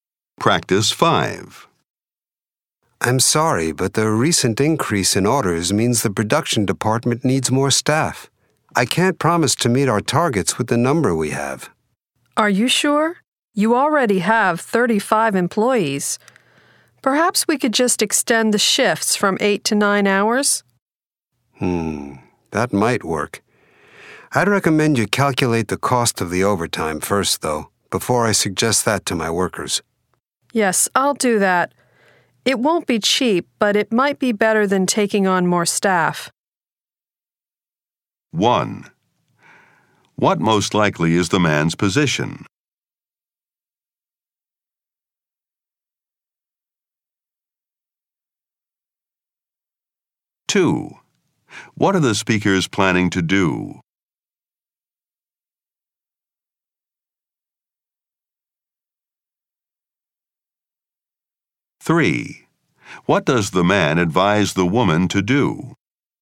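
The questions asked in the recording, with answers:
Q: What does the man advise the woman to do?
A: Calculate the cost of the overtime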